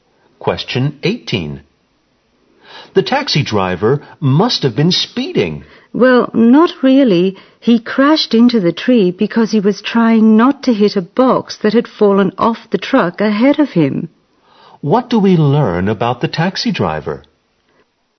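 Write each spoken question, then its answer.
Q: What do we learn about the taxi driver?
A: He crashed into a tree while trying to avoid a box that had fallen off the truck ahead of him, not because he was speeding.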